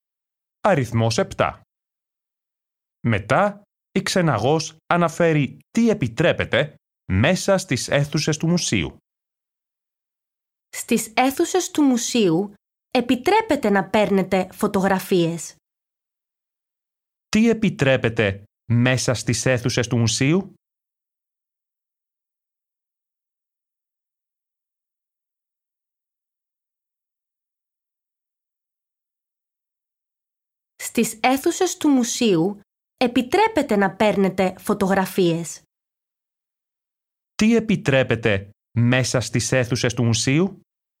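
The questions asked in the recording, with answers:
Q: Τι επιτρέπεται μέσα στις αίθουσες του μουσείου?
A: να παίρνετε φωτογραφίες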